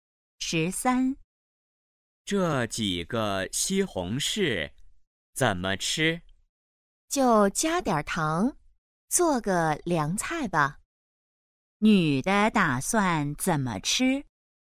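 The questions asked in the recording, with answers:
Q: 女的打算怎么吃?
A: 加糖做凉菜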